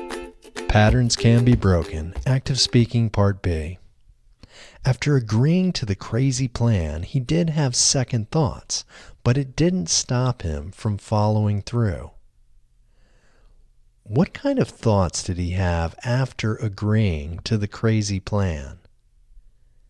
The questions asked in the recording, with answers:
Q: What kind of thoughts did he have after agreeing to the crazy plan?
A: He had second thoughts after agreeing to the crazy plan.